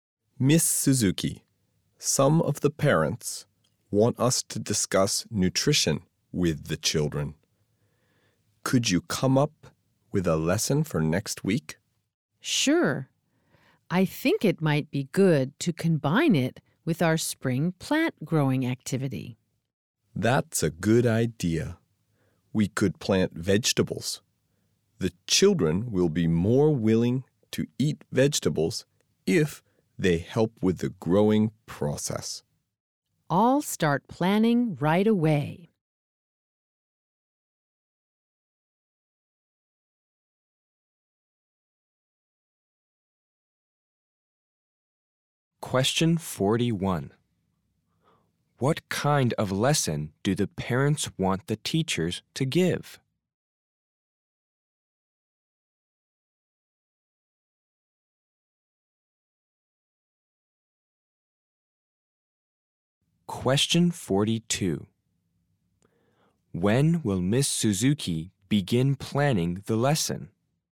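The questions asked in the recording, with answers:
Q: What kind of lesson do the parents want the teachers to give?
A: A lesson about nutrition

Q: When will Miss Suzuki begin planning the lesson?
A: Right away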